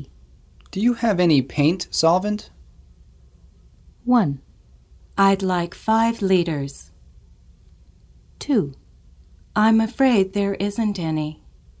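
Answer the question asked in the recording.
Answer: 2: I'm afraid there isn't any.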